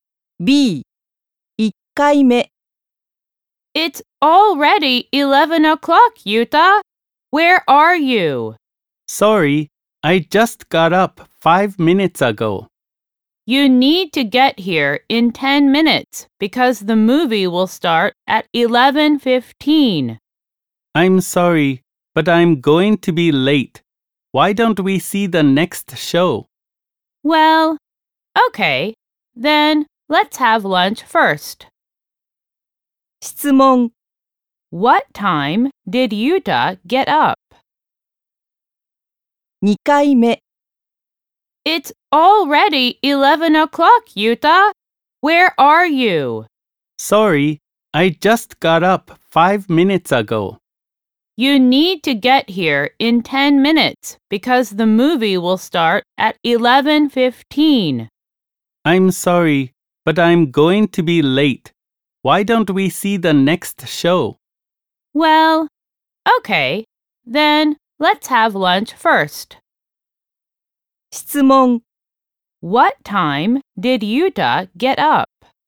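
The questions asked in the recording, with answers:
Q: What time did Yuta get up?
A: At 10:55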